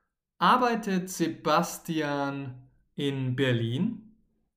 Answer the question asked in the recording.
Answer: Nein. Sebastian arbeitet nicht in Berlin, sondern er arbeitet in München.